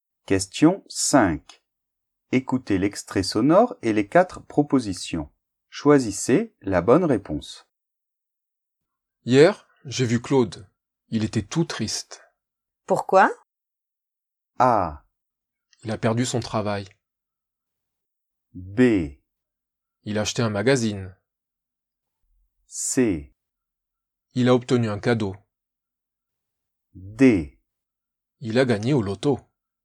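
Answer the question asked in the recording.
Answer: A: Il a perdu son travail.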